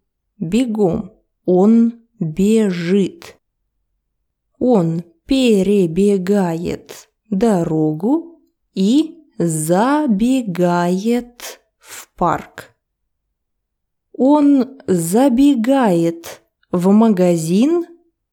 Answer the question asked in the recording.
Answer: Нет, он забегает в парк.